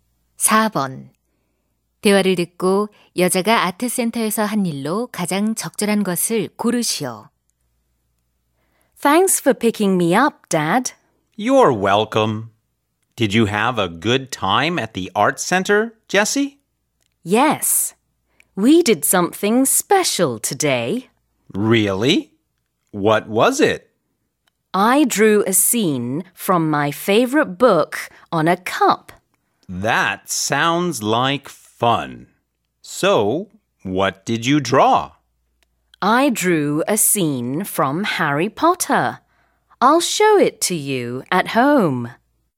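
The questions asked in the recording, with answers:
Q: 대화를 듣고 여자가 아트센터에서 한 일로 가장 적절한 것을 고르시오.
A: 컵에 좋아하는 책의 한 장면을 그렸다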